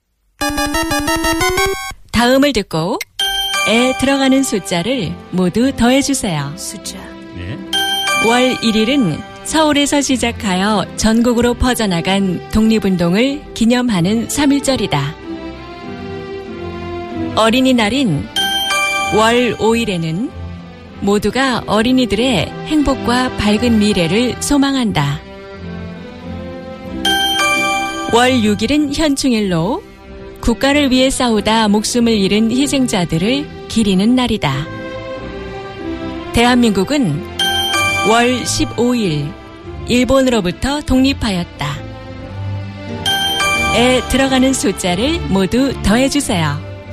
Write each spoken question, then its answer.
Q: 에 들어가는 숫자를 모두 더해주세요.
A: So 3, 5, 6, 8, making a total of